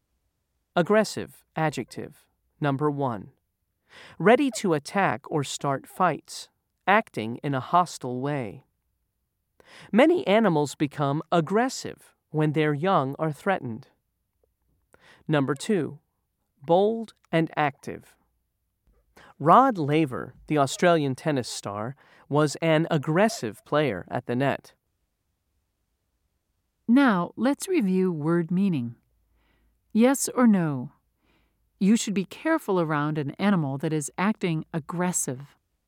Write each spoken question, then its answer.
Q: Yes or no? You should be careful around an animal that is acting aggressive.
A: If you said yes, you're correct.